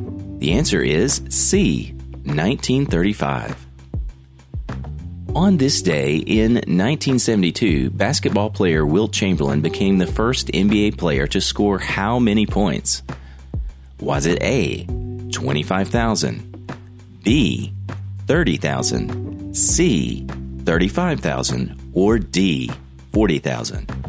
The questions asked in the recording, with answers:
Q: On this day in 1972, basketball player Wilt Chamberlain became the first NBA player to score how many points?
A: The answer is B, 30,000 points.